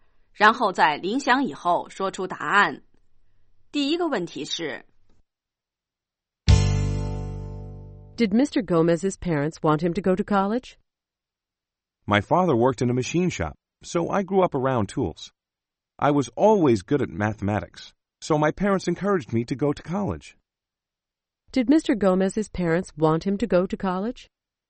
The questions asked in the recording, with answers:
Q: Did Mr. Gomez's parents want him to go to college?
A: Yes, they did. They encouraged him to go to college.